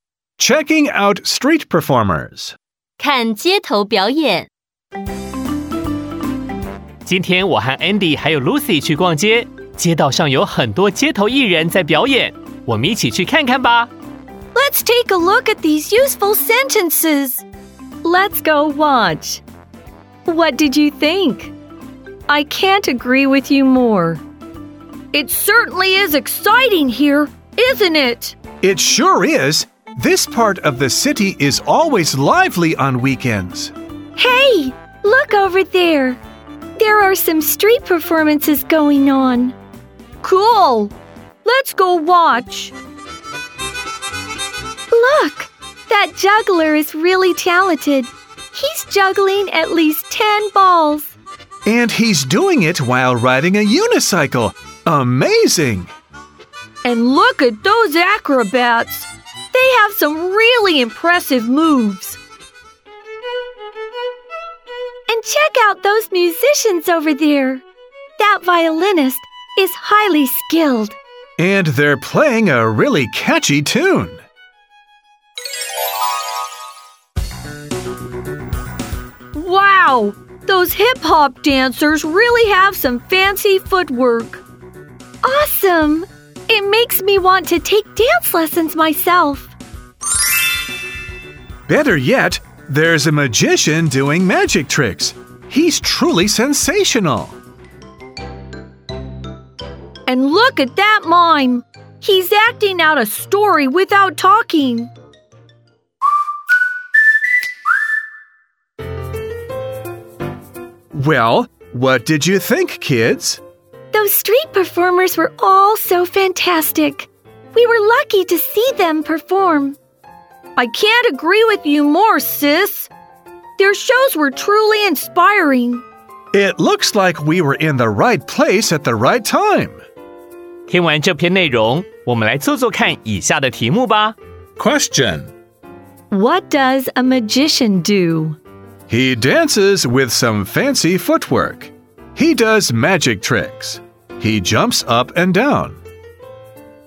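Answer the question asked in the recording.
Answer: He does magic tricks.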